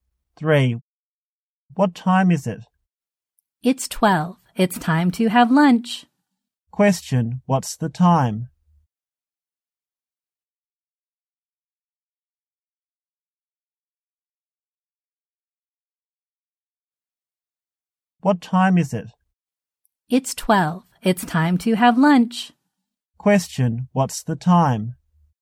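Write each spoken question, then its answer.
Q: What's the time?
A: 12 o'clock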